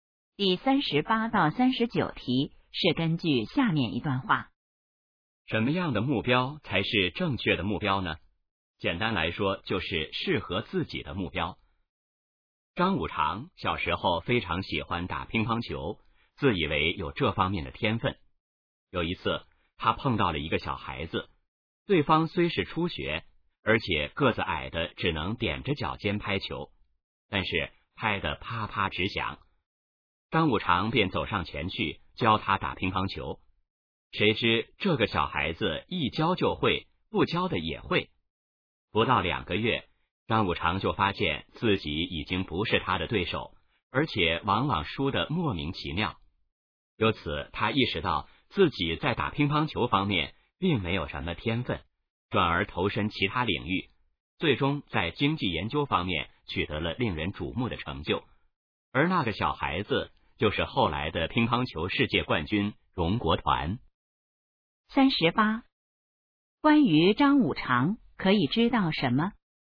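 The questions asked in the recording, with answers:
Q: 这段话主要想说明什么?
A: 要选择适合自己的目标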